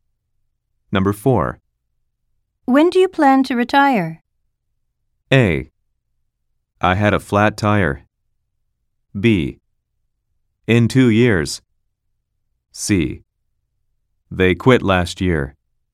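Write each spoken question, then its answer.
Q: When do you plan to retire?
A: B: In 2 years.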